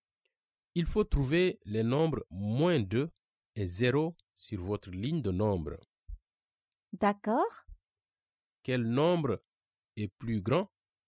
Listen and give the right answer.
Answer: Donc, la réponse est 0.